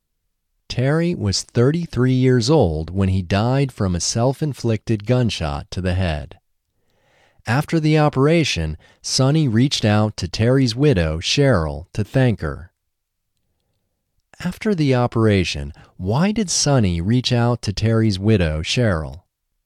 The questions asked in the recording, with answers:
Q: After the operation, why did Sonny reach out to Terry's widow, Cheryl?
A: After the operation, Sonny reached out to Terry's widow, Cheryl, to thank her.